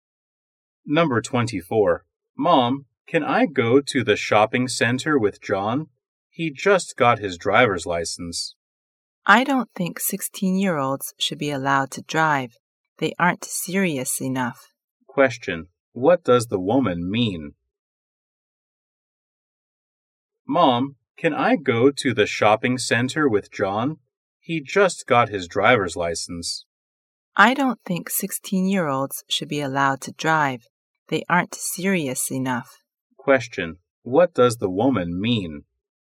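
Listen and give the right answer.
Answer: She doesn't want him to go with John, because 16-year-olds shouldn't drive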